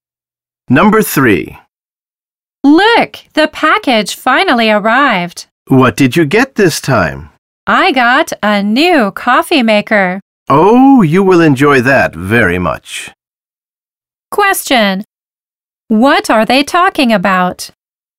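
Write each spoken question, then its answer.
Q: What are they talking about?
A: A new coffee maker that arrived in a package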